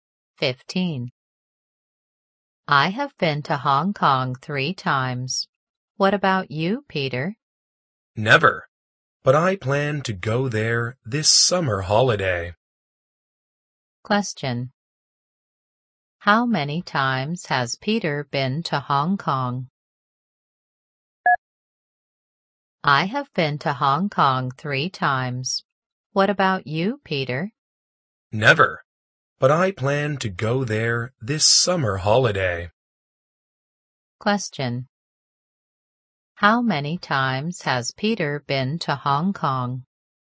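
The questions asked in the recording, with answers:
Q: How many times has Peter been to Hong Kong?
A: Never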